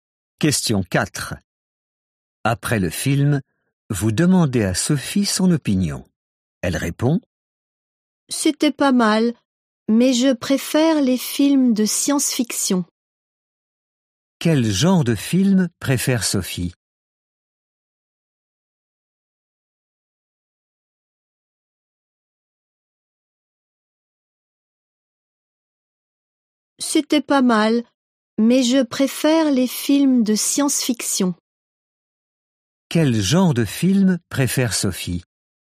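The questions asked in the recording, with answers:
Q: Quel genre de film préfère Sophie ?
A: Les films de science-fiction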